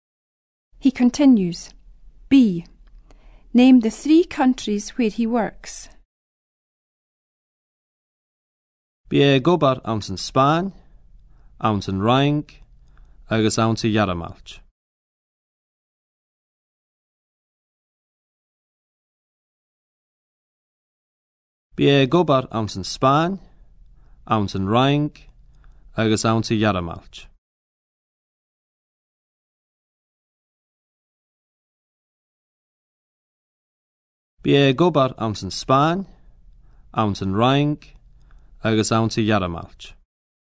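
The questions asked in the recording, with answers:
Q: Name the 3 countries where he works.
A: Spain, France and Germany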